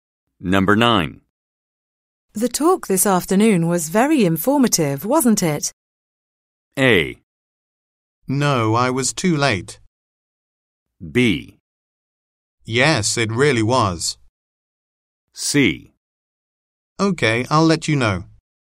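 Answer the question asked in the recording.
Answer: B: Yes, it really was.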